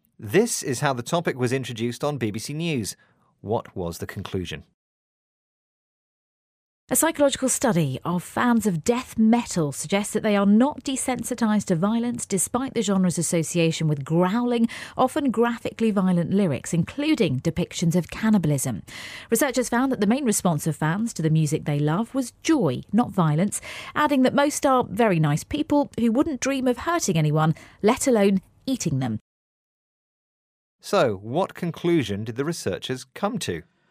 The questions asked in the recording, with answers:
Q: What was the conclusion?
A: Well, they found that the response to the music was joy, not anger or violence.